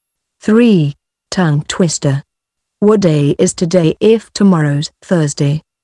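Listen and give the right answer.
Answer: Wednesday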